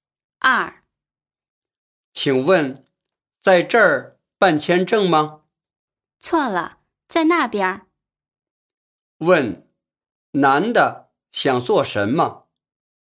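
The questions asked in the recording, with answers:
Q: 问,男的想做什么?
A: 办签证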